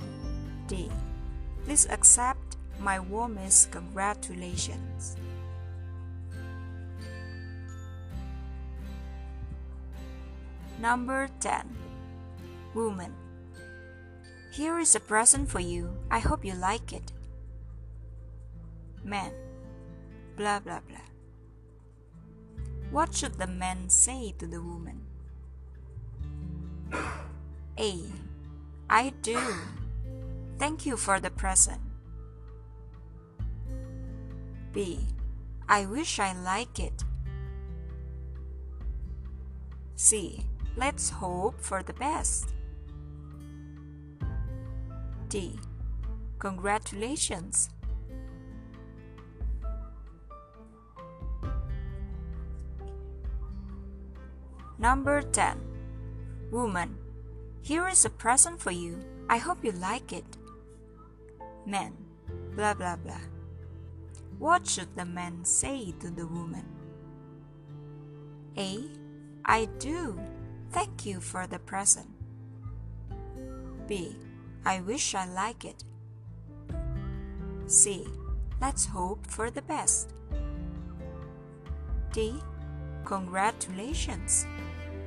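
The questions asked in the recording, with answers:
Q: What should the man say to the woman?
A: A: I do. Thank you for the present.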